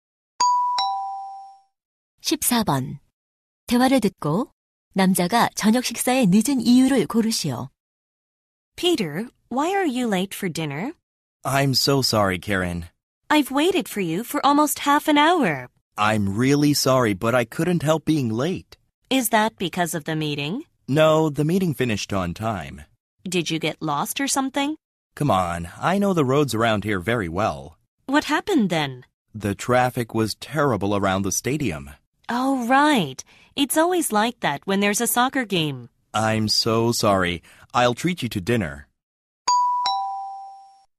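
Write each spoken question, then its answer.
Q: 대화를 듣고 남자가 저녁 식사에 늦은 이유를 고르시오.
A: 경기장 주변 교통 체증 때문에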